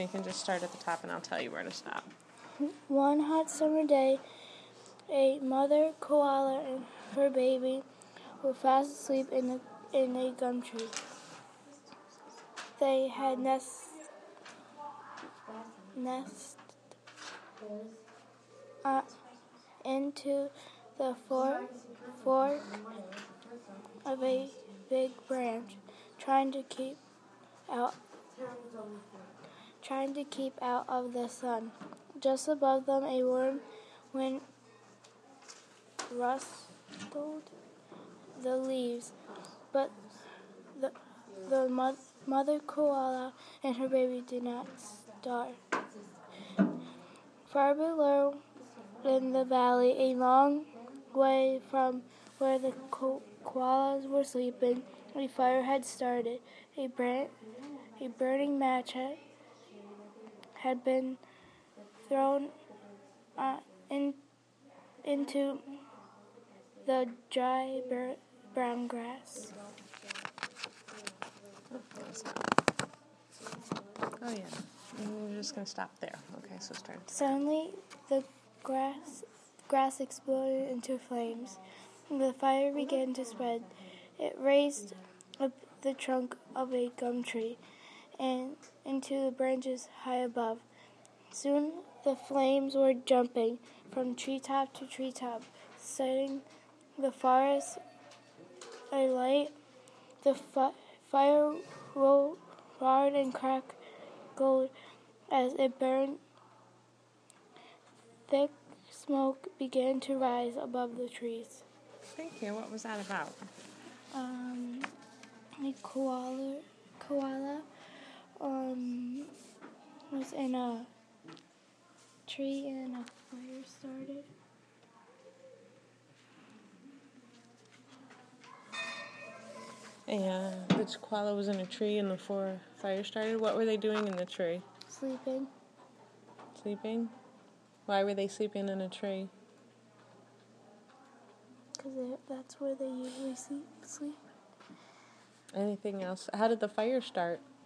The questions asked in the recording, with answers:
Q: How did the fire start?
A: A match had been thrown on the brown grass.